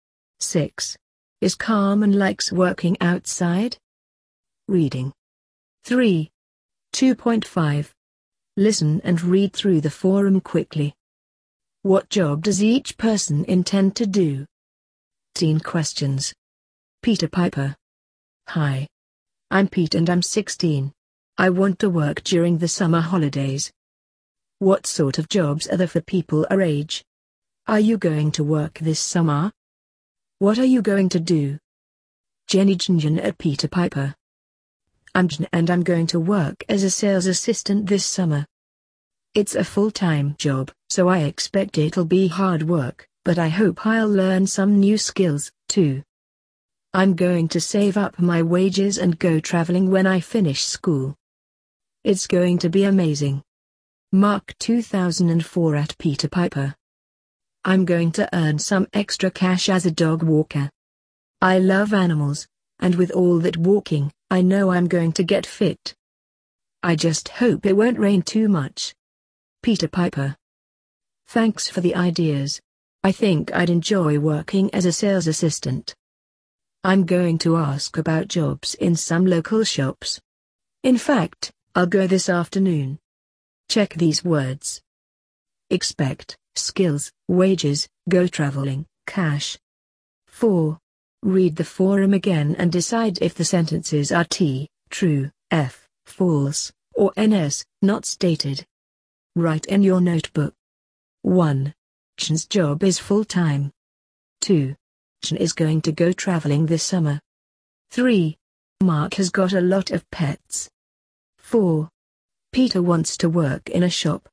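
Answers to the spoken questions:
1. Jin: sales assistant; Mark: dog walker; Pete: sales assistant
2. T: true
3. F: false
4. NS: not stated
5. T: true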